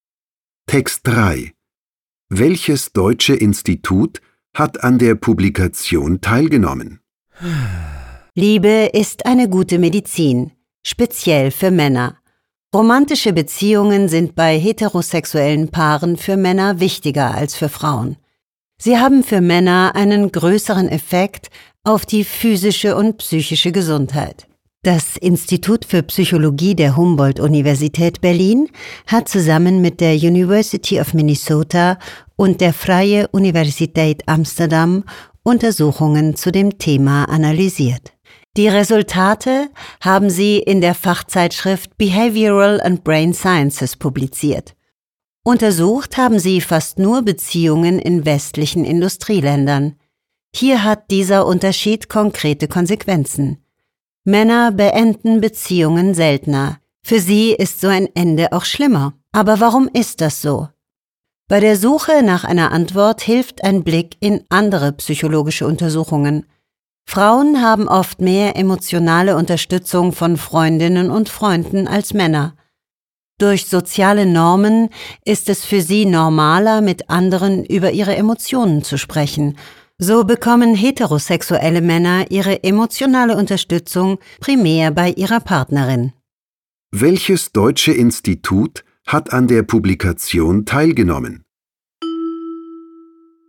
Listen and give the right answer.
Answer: Das Institut für Psychologie der Humboldt-Universität Berlin hat an der Publikation teilgenommen.